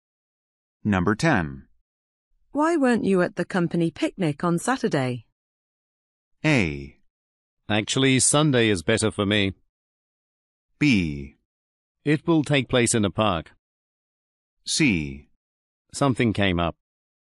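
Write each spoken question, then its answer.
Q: Why weren't you at the company picnic on Saturday?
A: C: Something came up.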